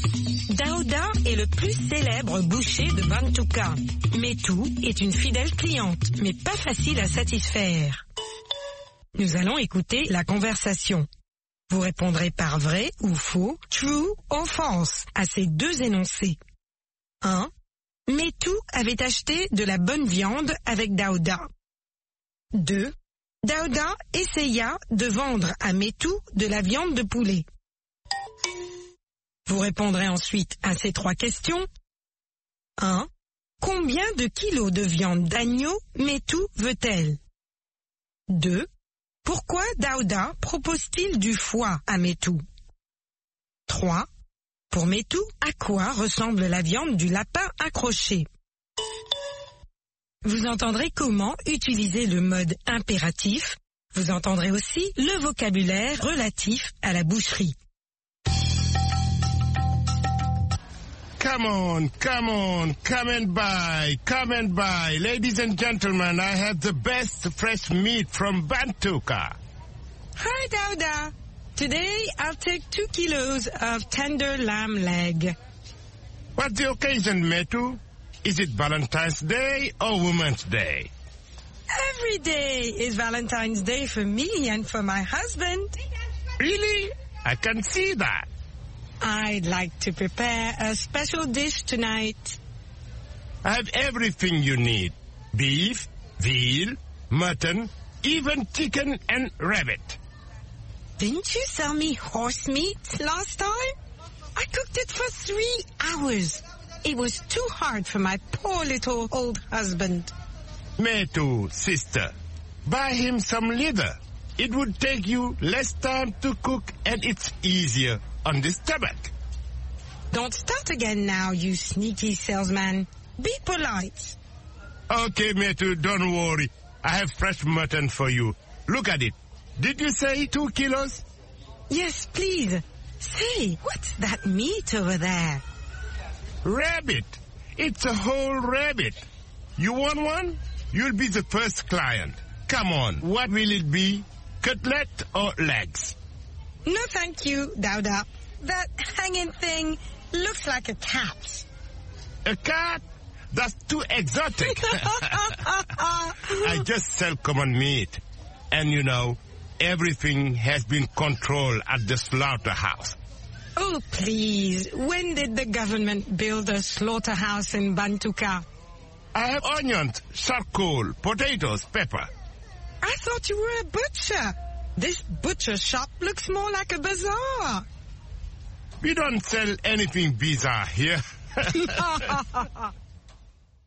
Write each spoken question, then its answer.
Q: Métou avait acheté de la bonne viande avec Daouda.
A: L'énoncé 1 est faux.

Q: Daouda essaya de vendre à Métou de la viande de poulet.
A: L'énoncé 2 est faux.

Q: Combien de kilos de viande d'agneau Métou veut-elle?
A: 2 kilos.

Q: Pourquoi Daouda propose-t-il du foie à Métou?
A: Ça prend moins de temps à cuire.

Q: Pour Métou, à quoi ressemble la viande du lapin accroché?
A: À un chat.